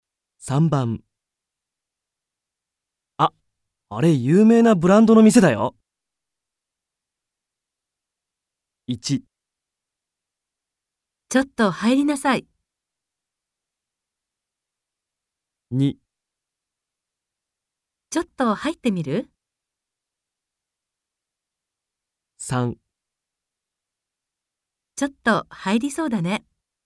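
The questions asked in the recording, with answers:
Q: あ、あれ有名なブランドの店だよ。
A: 2: ちょっと入ってみる?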